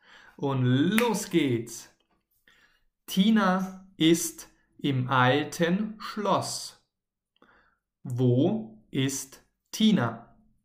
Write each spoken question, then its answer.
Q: Wo ist Tina?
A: Im alten Schloss natürlich.